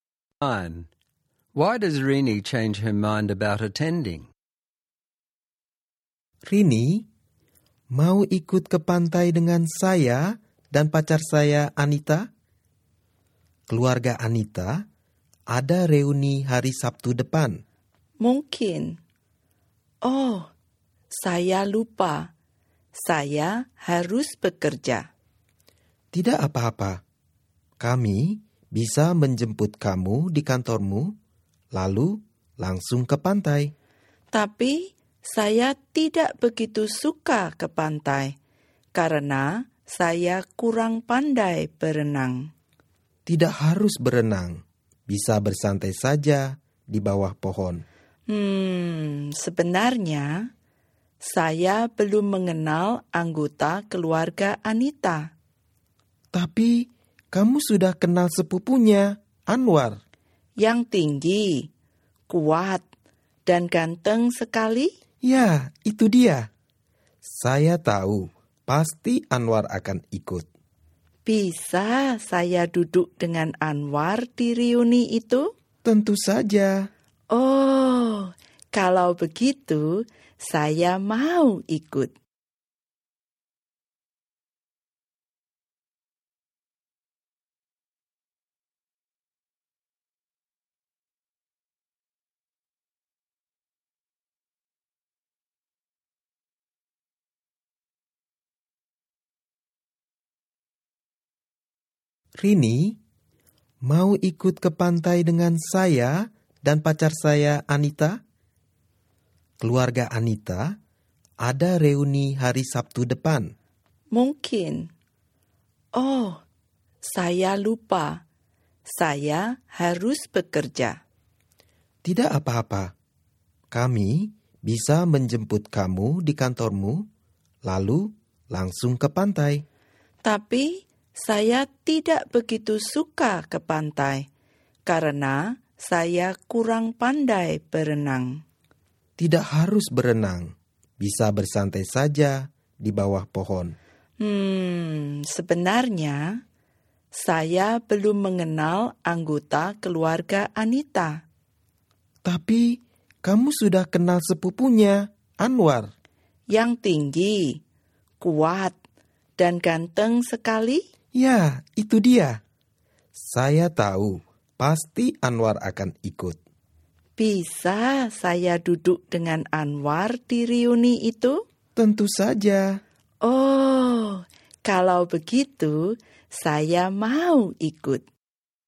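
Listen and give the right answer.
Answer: Because Anita's handsome cousin Anwar will be there and she can sit with him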